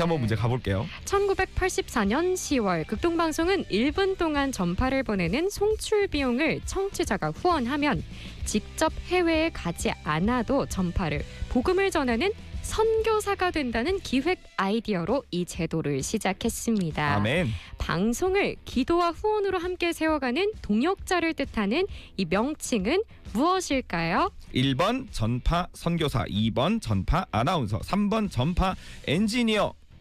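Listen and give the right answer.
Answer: 1: 전파 선교사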